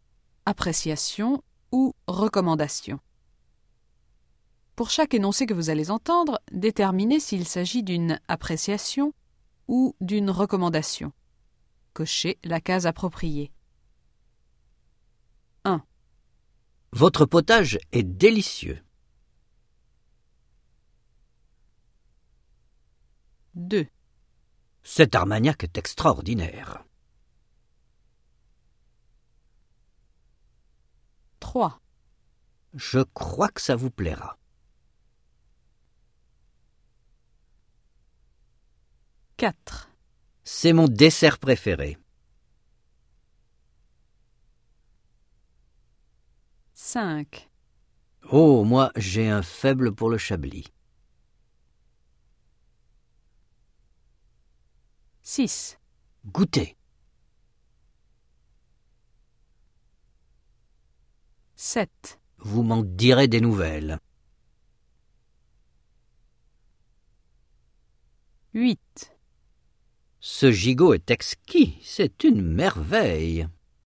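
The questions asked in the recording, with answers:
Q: Votre potage est délicieux.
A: appréciation

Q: Cet armagnac est extraordinaire.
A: appréciation

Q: Je crois que ça vous plaira.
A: recommandation

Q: Goûtez.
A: recommandation

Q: Vous m'en direz des nouvelles.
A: recommandation

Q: Ce gigot est exquis, c'est une merveille.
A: appréciation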